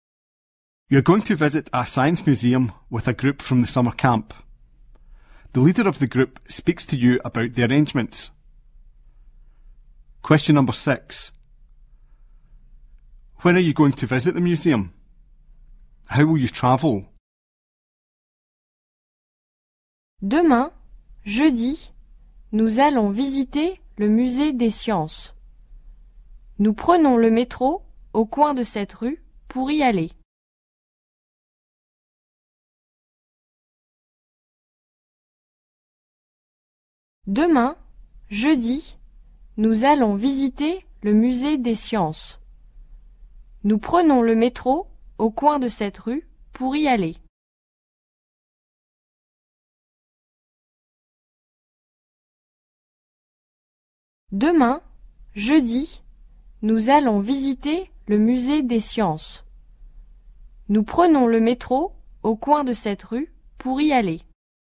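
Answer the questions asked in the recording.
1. Tomorrow, Thursday
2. By underground (metro)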